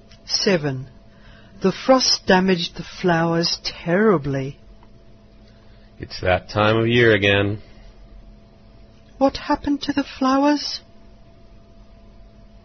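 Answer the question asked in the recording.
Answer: The frost badly damaged them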